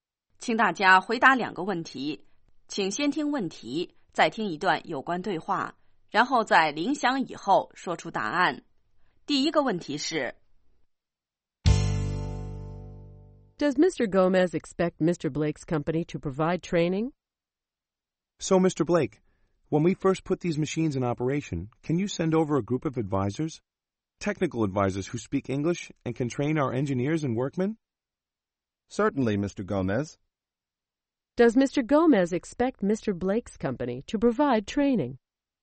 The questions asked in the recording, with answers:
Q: Does Mr. Gomez expect Mr. Blake's company to provide training?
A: Yes, he does.He expects the company to send a group of technical advisors to provide training.